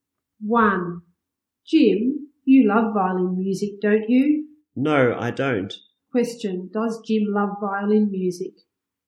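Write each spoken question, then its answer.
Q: Question, does Jim love violin music?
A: No, he doesn't.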